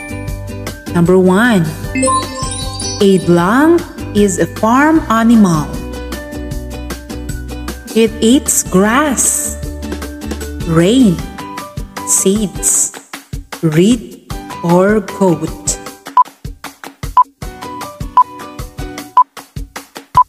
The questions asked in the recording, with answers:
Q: A lung is a farm animal.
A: The answer is goat.